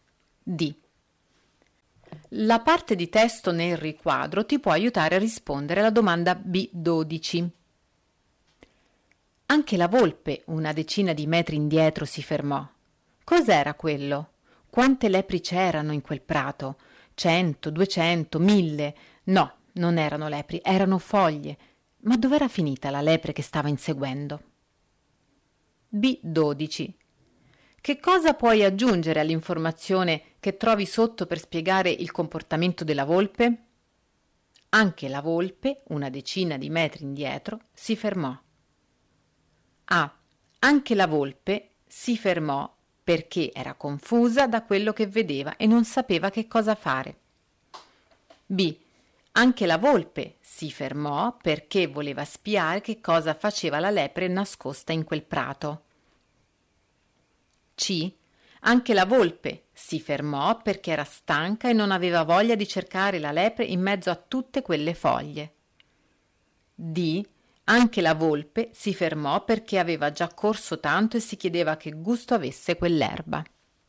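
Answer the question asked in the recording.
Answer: A: Anche la volpe si fermò perché era confusa da quello che vedeva e non sapeva che cosa fare.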